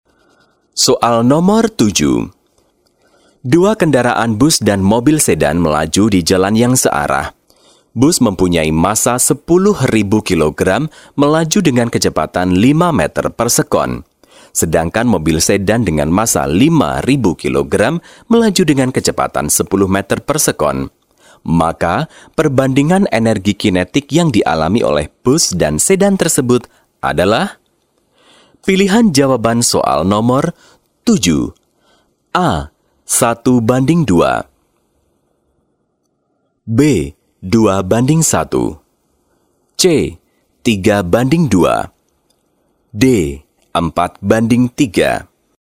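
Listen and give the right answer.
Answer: A: 1 banding 2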